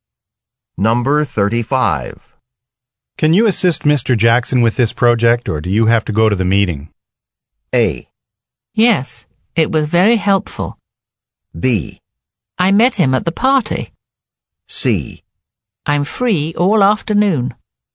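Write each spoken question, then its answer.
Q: Can you assist Mr. Jackson with this project, or do you have to go to the meeting?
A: C: I'm free all afternoon.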